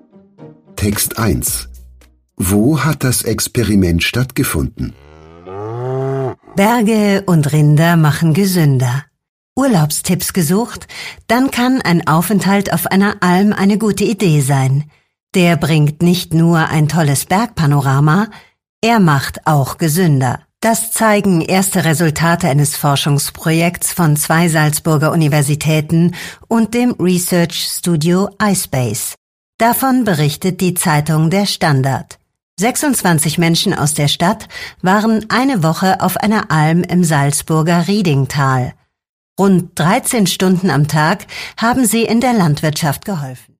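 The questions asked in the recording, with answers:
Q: Wo hat das Experiment stattgefunden?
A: Auf einer Alm im Salzburger Riedingtal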